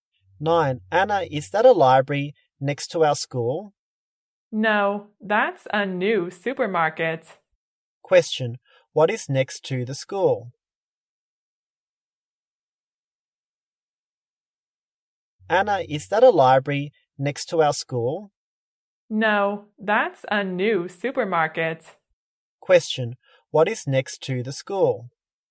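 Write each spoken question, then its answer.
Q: Question, what is next to the school?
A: A new supermarket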